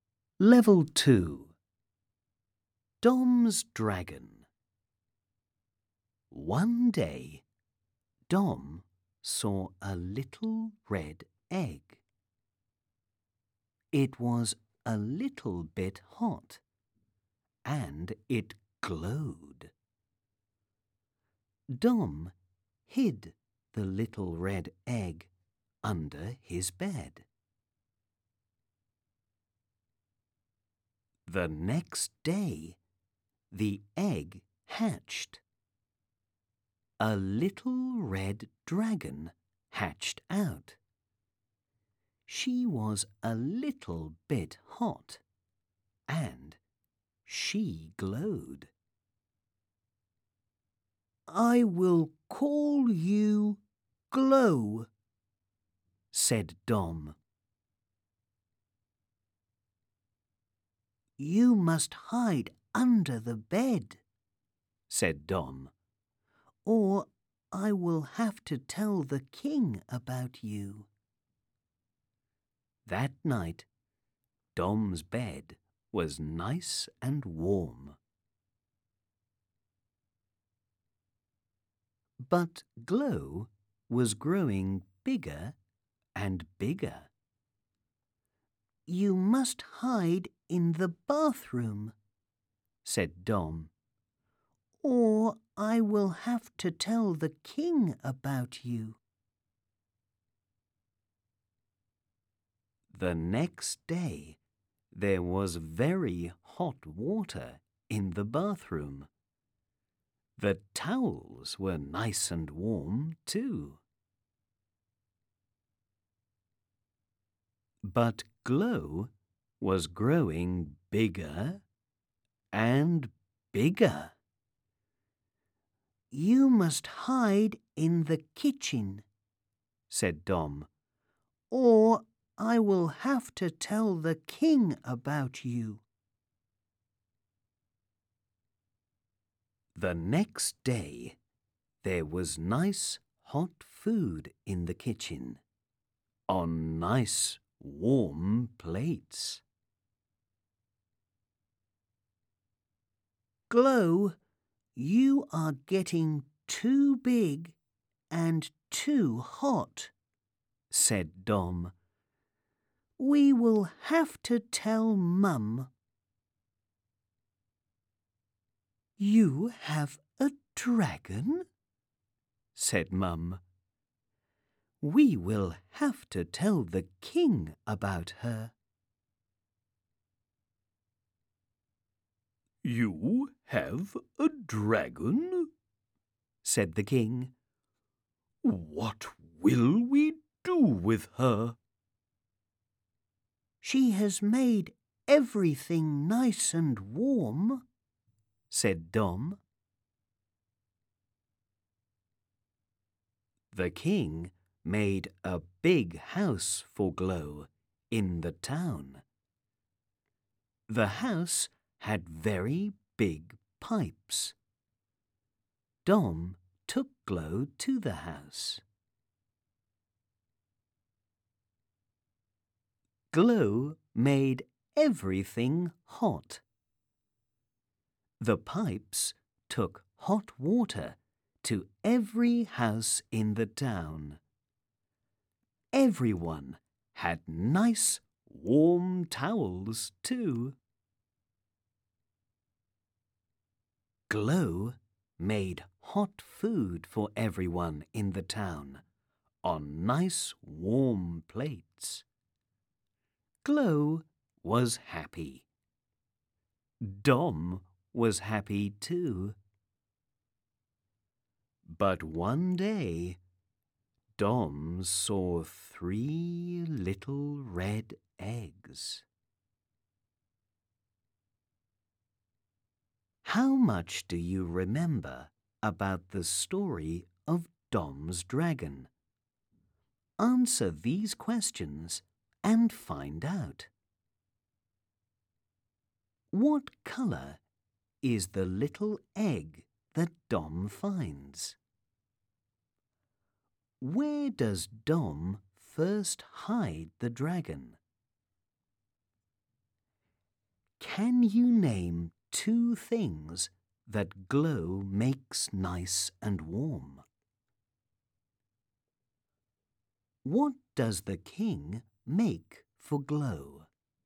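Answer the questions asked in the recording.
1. Red
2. Under his bed
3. Dom's bed and the towels (also the water, food and plates)
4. A big house in the town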